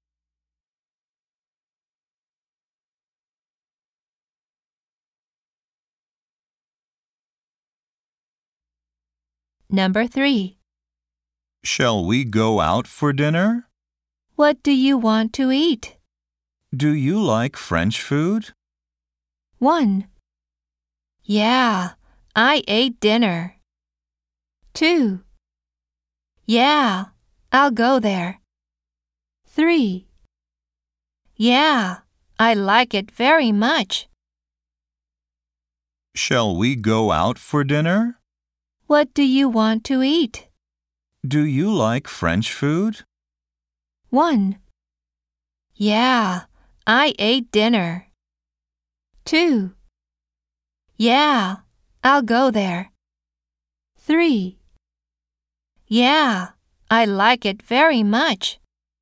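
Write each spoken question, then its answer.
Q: Do you like French food?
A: 3: Yeah, I like it very much.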